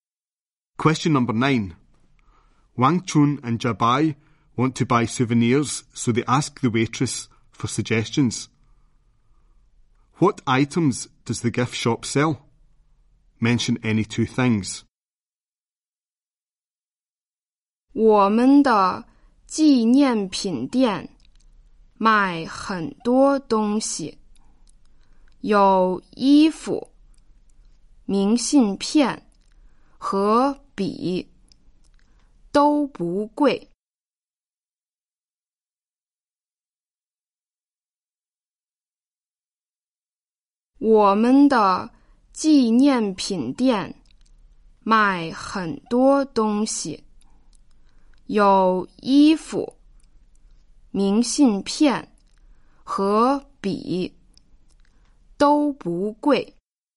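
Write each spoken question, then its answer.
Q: What items does the gift shop sell?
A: Clothes, postcards, pens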